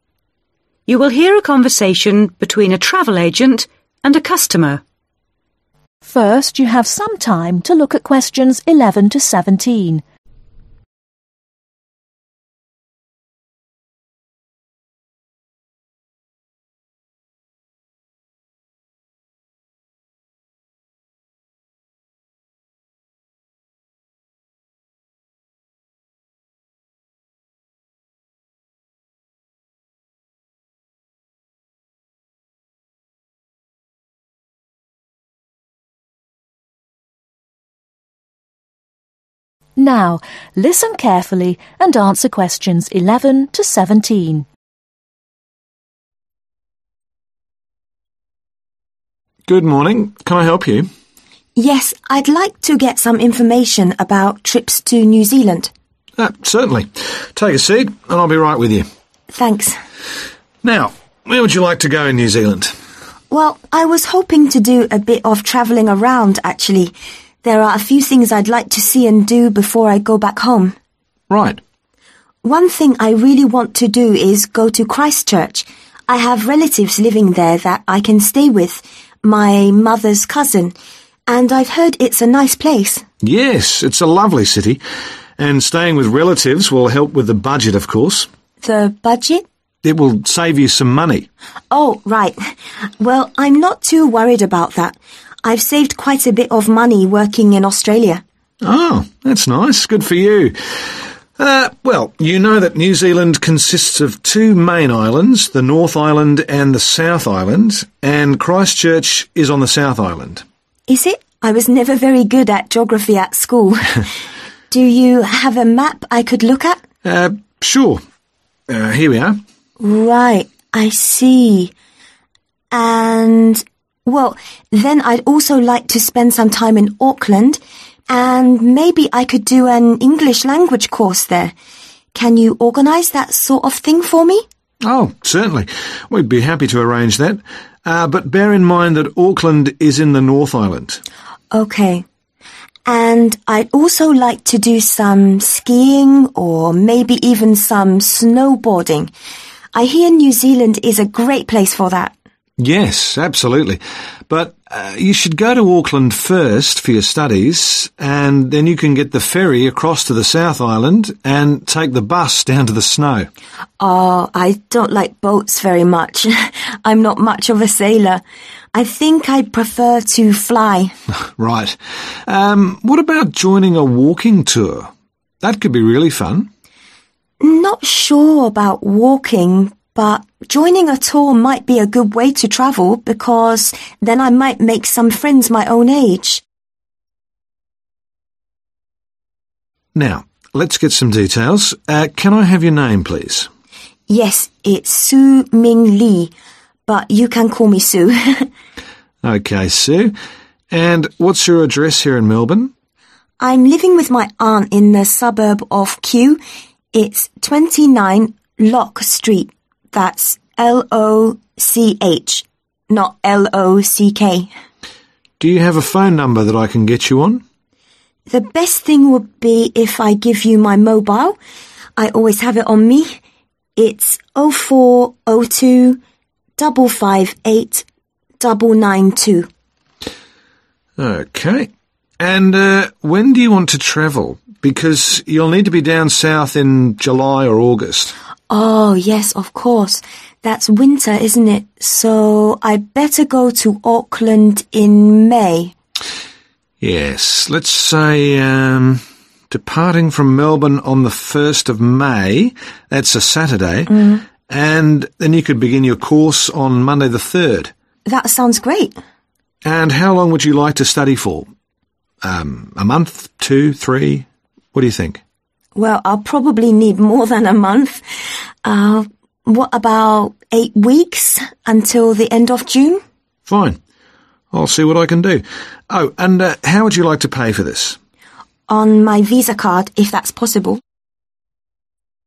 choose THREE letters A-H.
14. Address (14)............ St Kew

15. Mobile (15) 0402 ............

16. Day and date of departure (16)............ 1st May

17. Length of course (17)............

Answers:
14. 29 LOCH
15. 558992
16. Saturday
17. 8 weeks/2 months